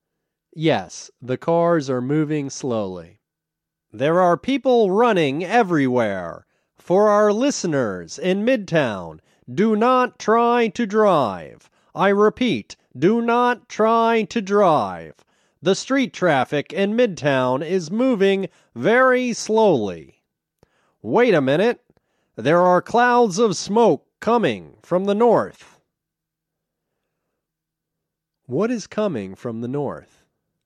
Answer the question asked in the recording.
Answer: There are clouds of smoke coming from the north.